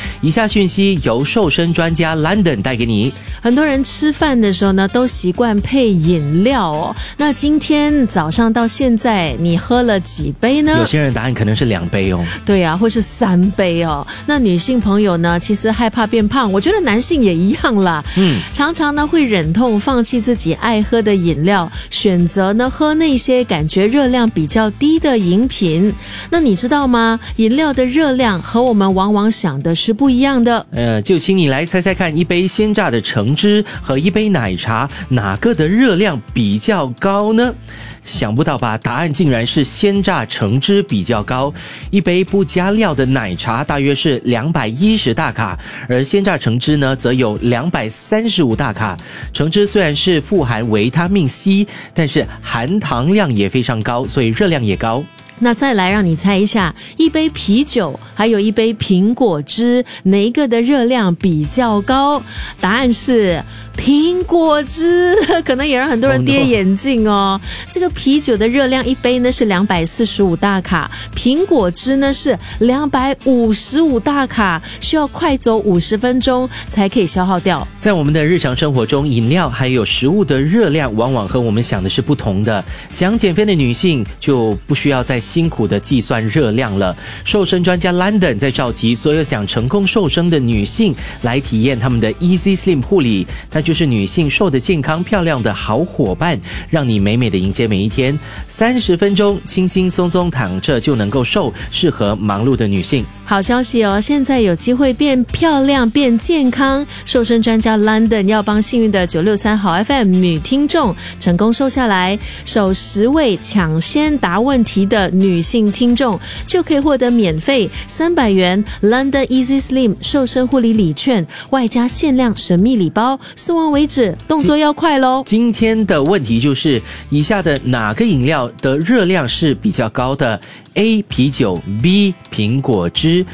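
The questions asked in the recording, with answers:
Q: 今天的问题就是,以下的哪个饮料的热量是比较高的?A 啤酒 B 苹果汁。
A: B: 苹果汁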